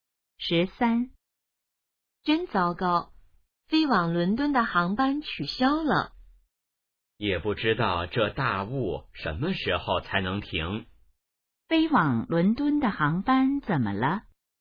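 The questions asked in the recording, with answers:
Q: 飞往伦敦的航班怎么了?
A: 因大雾取消了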